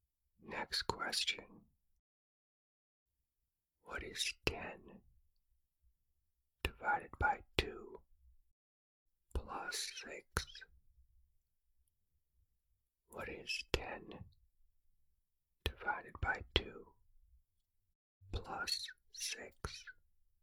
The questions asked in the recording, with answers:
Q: What is 10 divided by 2 plus 6?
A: The answer is 11.